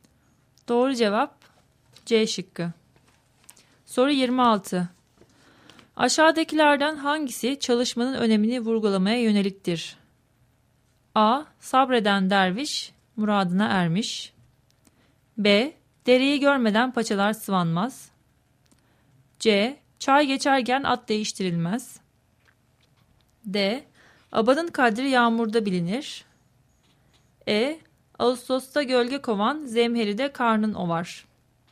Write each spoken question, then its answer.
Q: Aşağıdakilerden hangisi çalışmanın önemini vurgulamaya yöneliktir?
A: Doğru cevap E şıkkı.